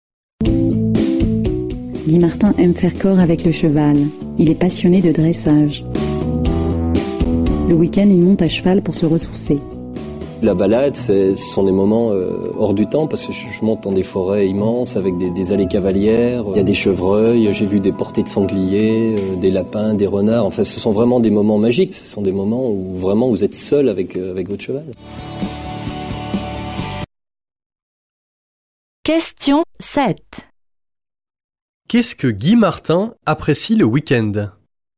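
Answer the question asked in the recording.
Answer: Les balades à cheval en forêt, seul avec son cheval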